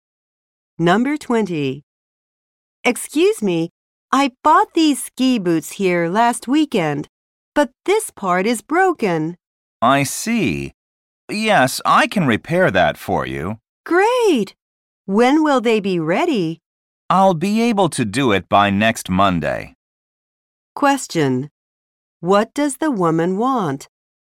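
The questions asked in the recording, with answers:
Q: What does the woman want?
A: To have her ski boots repaired.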